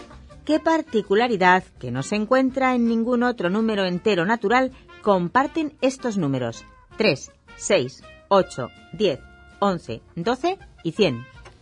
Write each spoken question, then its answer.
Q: ¿Qué particularidad que no se encuentra en ningún otro número entero natural comparten estos números?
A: Solución, que en español se escriben con cuatro letras.